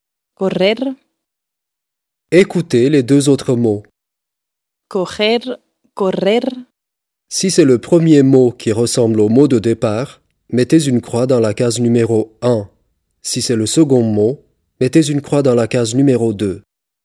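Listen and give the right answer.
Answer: 2: correr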